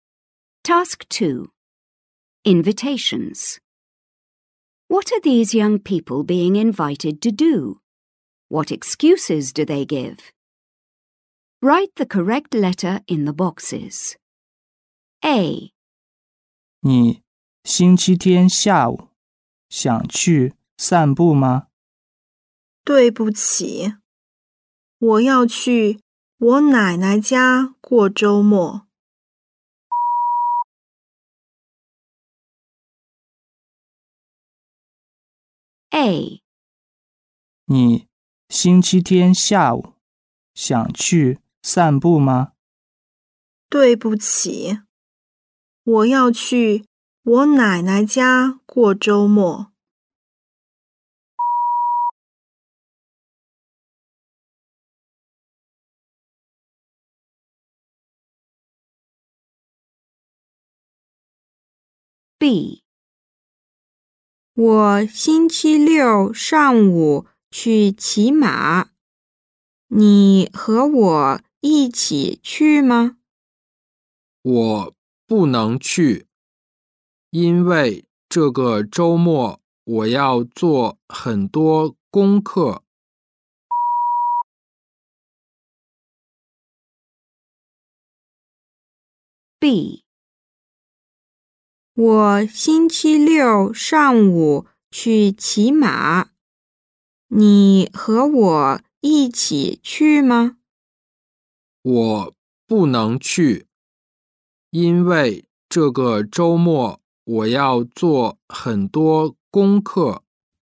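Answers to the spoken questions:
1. Go for a walk on Sunday afternoon
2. Going to grandma's for the weekend
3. Go horse riding on Saturday morning
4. Has a lot of homework this weekend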